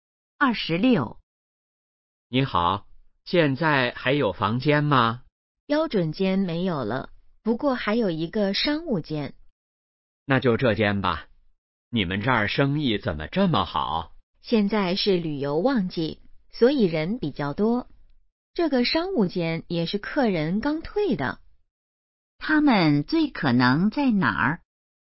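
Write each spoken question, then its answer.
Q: 他们最可能在哪儿?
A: 宾馆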